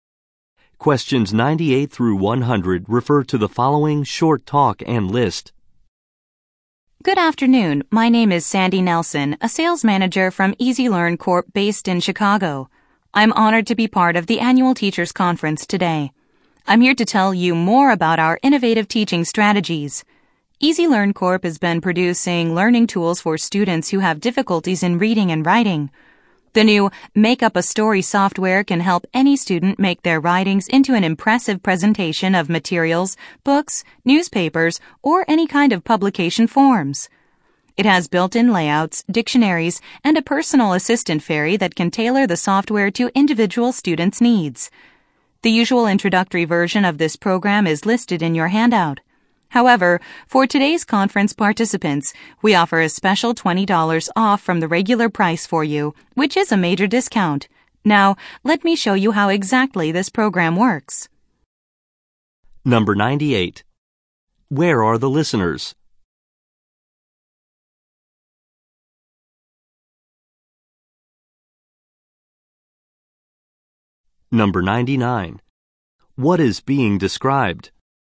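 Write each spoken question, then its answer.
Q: Where are the listeners?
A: At an annual teachers conference

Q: What is being described?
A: A software program, Make Up a Story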